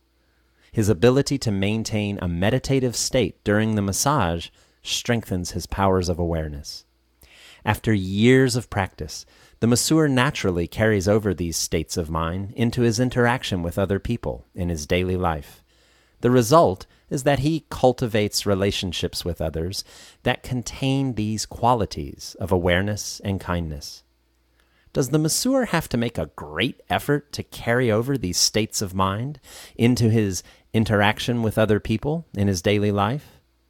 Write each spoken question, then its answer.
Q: Does the masseur have to make a great effort to carry over these states of mind into his interaction with other people in his daily life?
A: No. The masseur naturally carries over these states of mind in his dealings with other people.